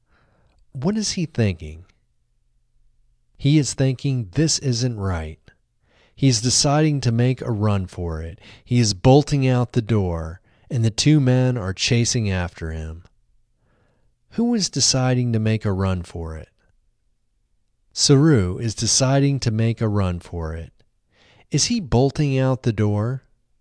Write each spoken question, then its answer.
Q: Is he bolting out the door?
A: Yes, he is bolting out the door.